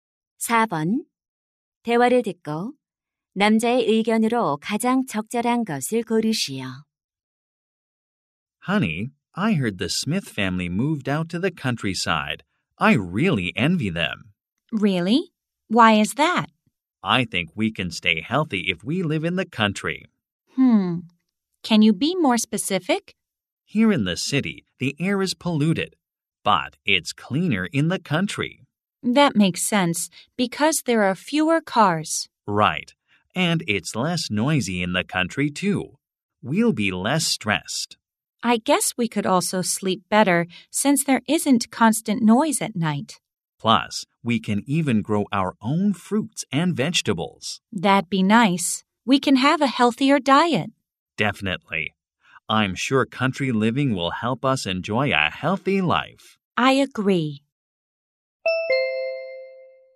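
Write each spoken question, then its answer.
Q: 대화를 듣고 남자의 의견으로 가장 적절한 것을 고르시오.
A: 시골 생활은 건강한 삶에 도움이 된다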